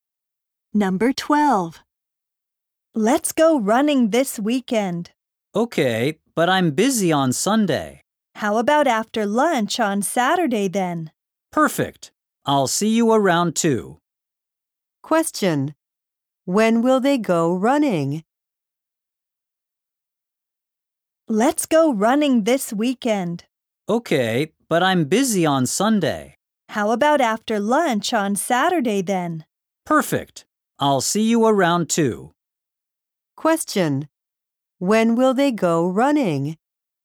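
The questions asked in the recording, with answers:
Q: When will they go running?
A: On Saturday after lunch, around 2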